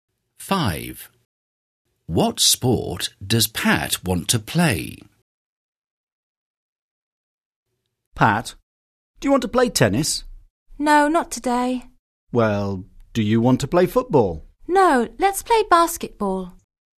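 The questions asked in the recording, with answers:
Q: What sport does Pat want to play?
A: Basketball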